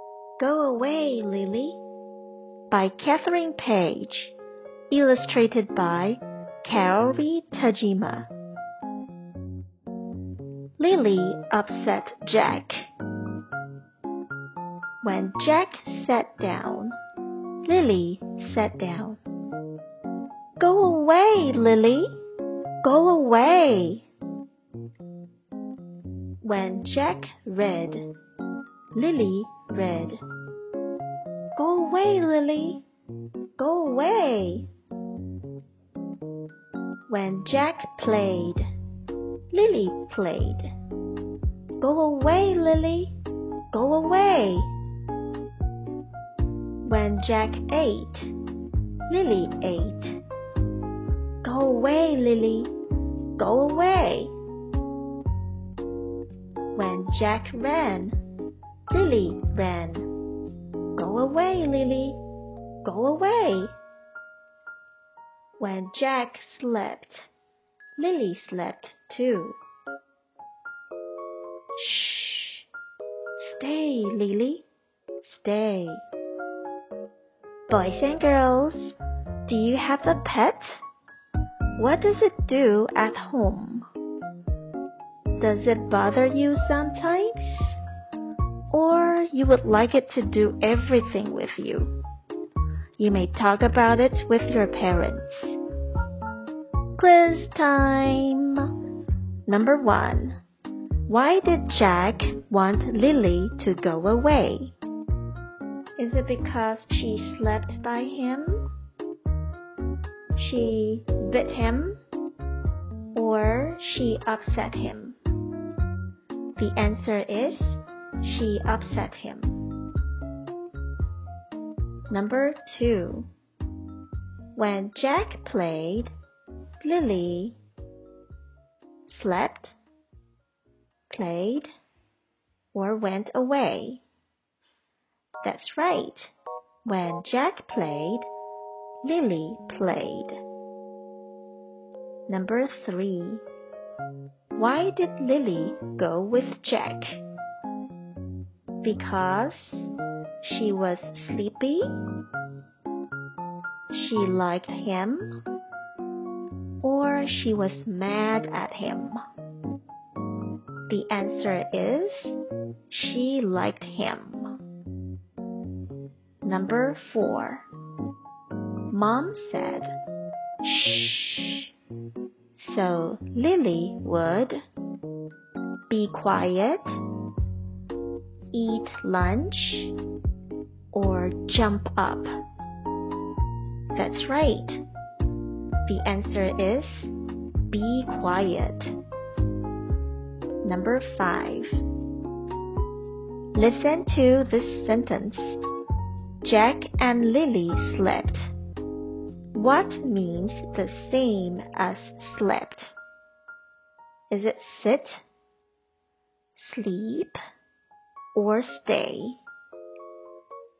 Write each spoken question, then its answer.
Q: Why did Jack want Lily to go away?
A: The answer is she upset him.

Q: When Jack played, Lily slept, played, or went away.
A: That's right. When Jack played, Lily played.

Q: Why did Lily go with Jack?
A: The answer is she liked him.

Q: Mom said, shh so Lily would be quiet, eat lunch, or jump up.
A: answer is be quiet.